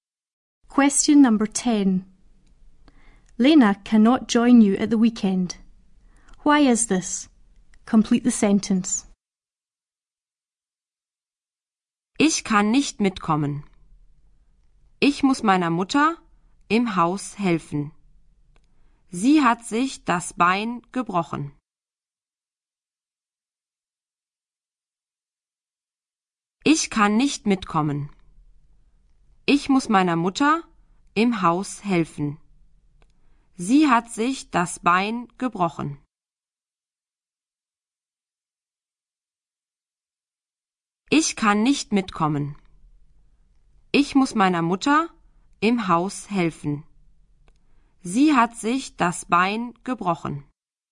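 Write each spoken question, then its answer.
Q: Why is this?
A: She must help her mother in the house because her mother has broken her leg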